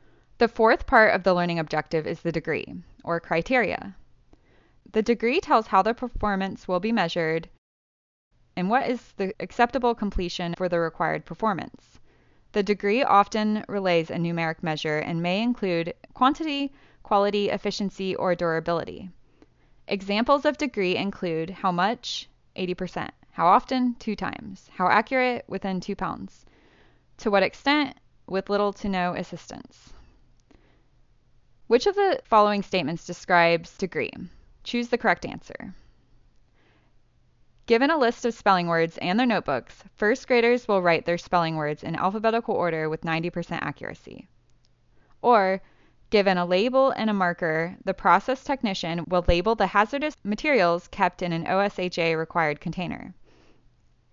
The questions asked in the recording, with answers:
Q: Which of the following statements describes degree?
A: If you chose, given a list of spelling words in their notebooks, first graders will write their spelling words in alphabetical order with 90% accuracy, the 90% accuracy must have given it away.